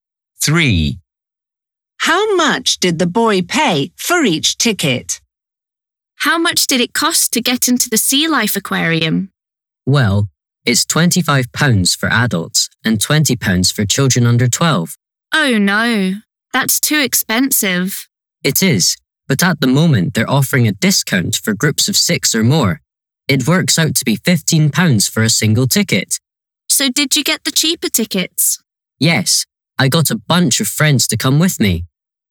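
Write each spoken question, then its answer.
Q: How much did the boy pay for each ticket?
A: £15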